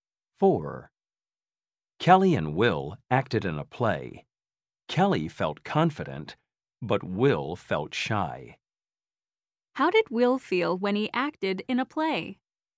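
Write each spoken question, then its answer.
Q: How did Will feel when he acted in a play?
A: shy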